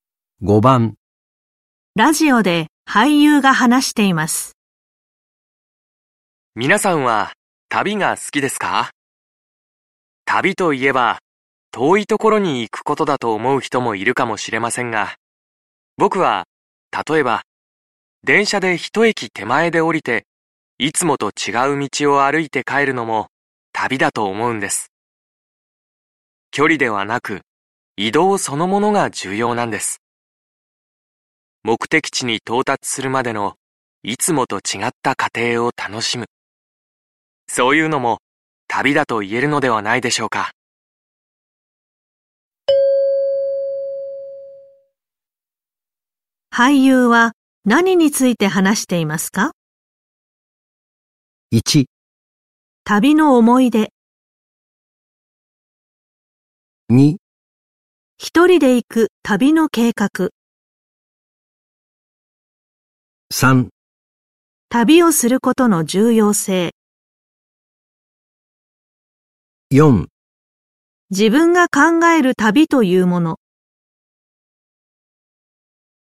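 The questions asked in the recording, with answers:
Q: 俳優は何について話していますか?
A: 4: 自分が考える旅というもの。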